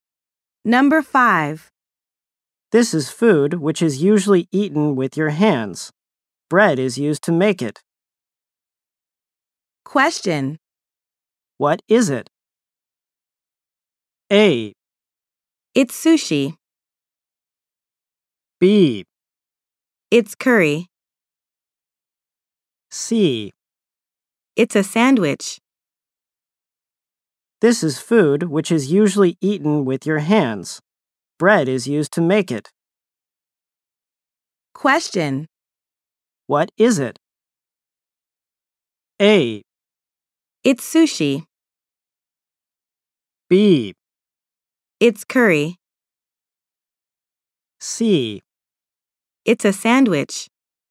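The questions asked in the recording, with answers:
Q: What is it?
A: C: It's a sandwich.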